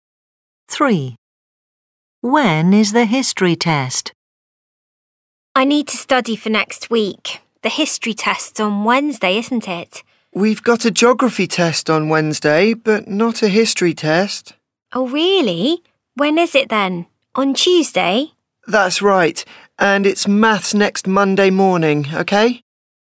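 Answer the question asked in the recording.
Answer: Tuesday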